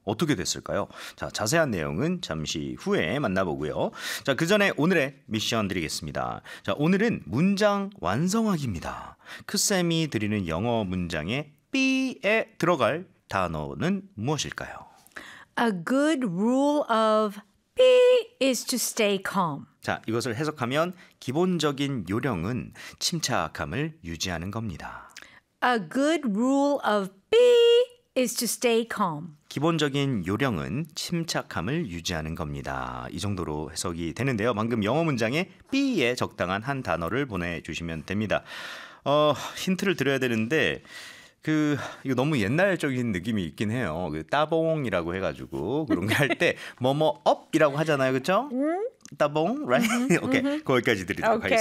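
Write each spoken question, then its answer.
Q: 크쌤이 드리는 영어 문장에 B에 들어갈 단어는 무엇일까요?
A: thumb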